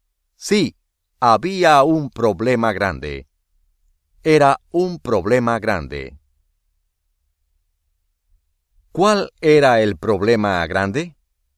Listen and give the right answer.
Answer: Ana no quería ir a la escuela.